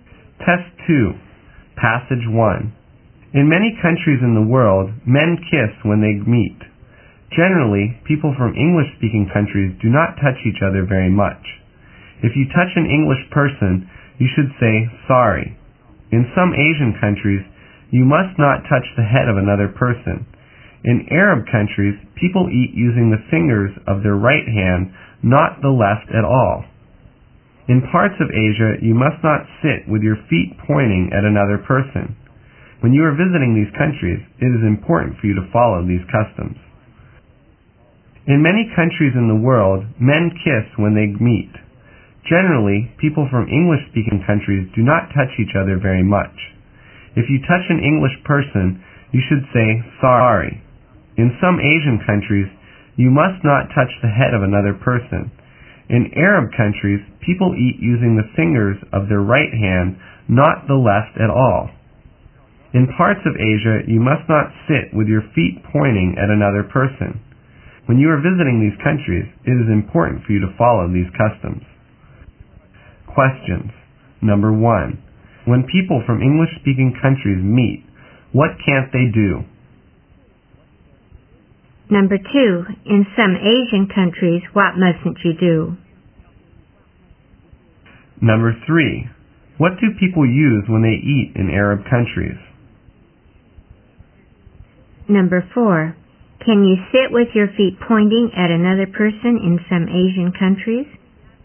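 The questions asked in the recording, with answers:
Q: In some Asian countries, what mustn't you do?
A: Touch the head of another person.

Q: What do people use when they eat in Arab countries?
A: The fingers of their right hand.

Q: Can you sit with your feet pointing at another person in some Asian countries?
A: No, you can't.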